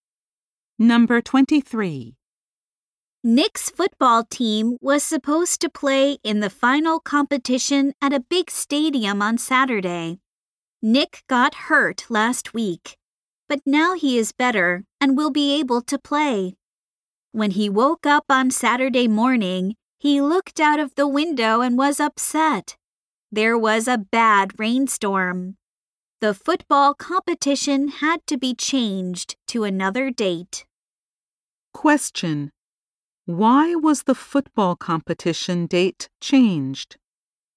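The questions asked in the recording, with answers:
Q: Why was the football competition date changed?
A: There was a bad rainstorm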